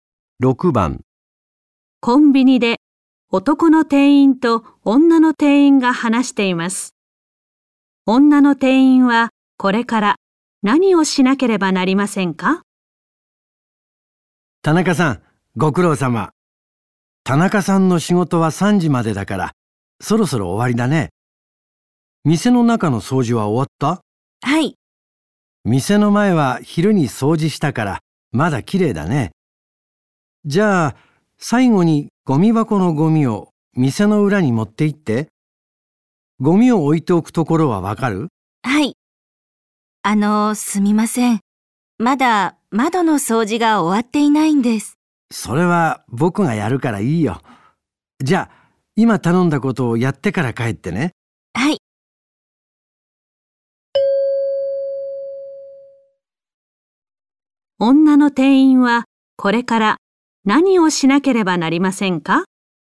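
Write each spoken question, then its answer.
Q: 女の店員はこれから何をしなければなりませんか?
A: ゴミ箱のゴミを店の裏に持って行く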